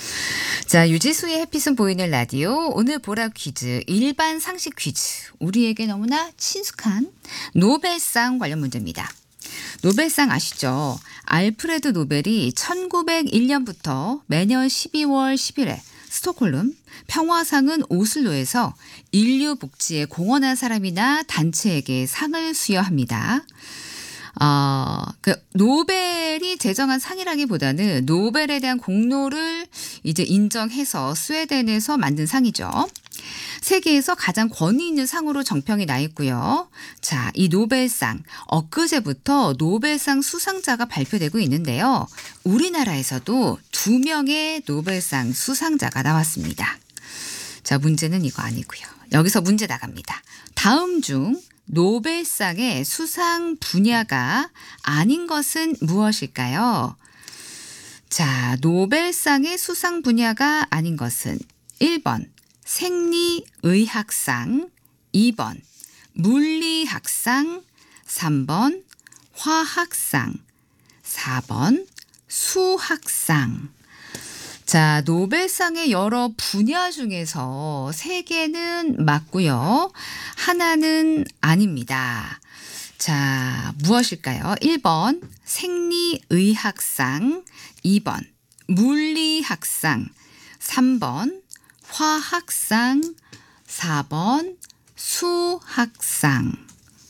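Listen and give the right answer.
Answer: 4: 수학상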